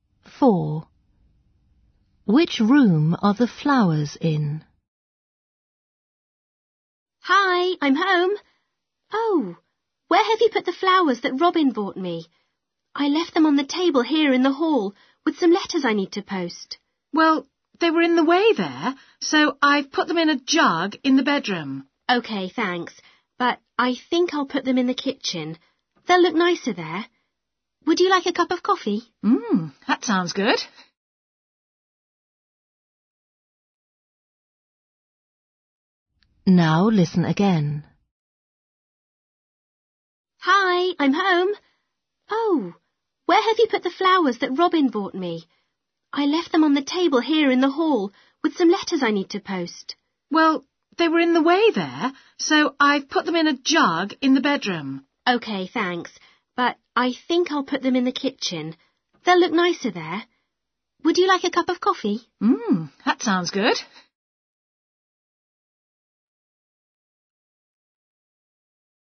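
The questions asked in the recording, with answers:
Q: Which room are the flowers in?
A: the bedroom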